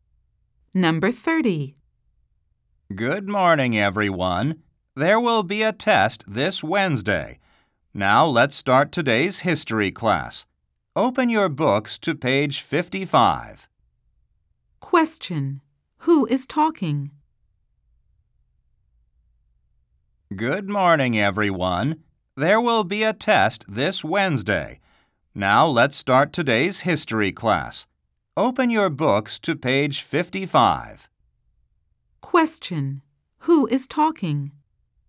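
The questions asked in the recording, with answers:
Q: Who is talking?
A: A (history) teacher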